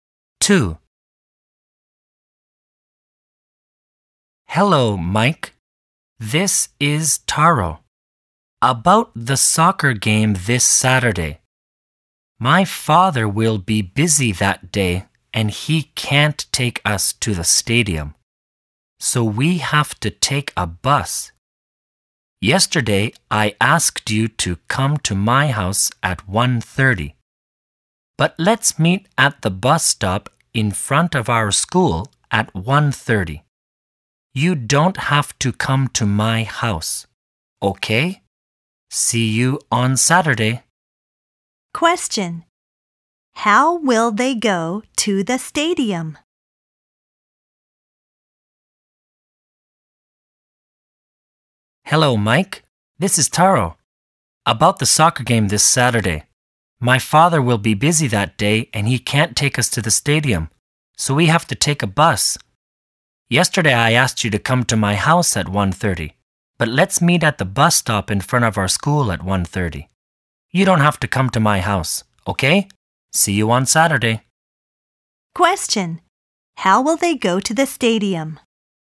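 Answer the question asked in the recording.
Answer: By bus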